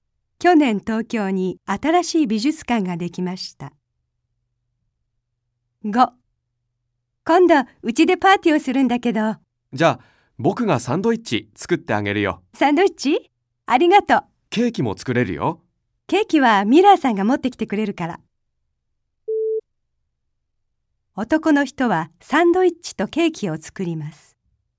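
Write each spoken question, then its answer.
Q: 男の人はサンドイッチとケーキを作ります。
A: ×(間違い)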